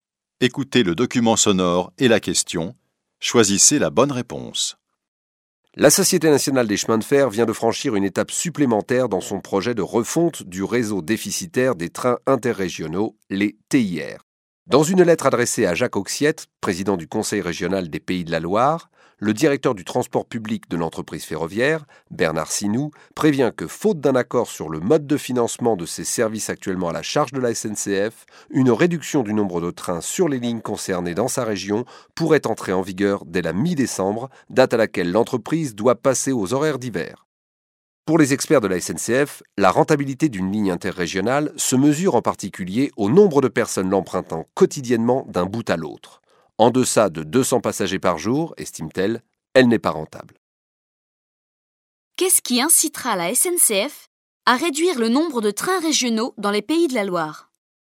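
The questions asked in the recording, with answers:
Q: Qu'est-ce qui incitera la SNCF à réduire le nombre de trains régionaux dans les Pays de la Loire ?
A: L'absence d'accord sur le mode de financement de ces services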